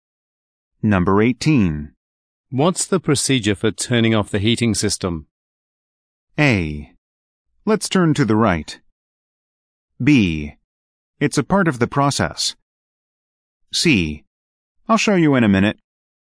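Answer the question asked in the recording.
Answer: C: I'll show you in a minute.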